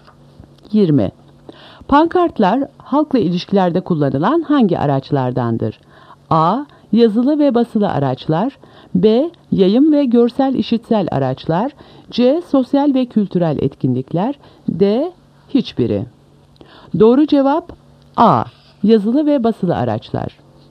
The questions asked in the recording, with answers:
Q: Pankartlar halkla ilişkilerde kullanılan hangi araçlardandır?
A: Doğru cevap A. Yazılı ve basılı araçlar.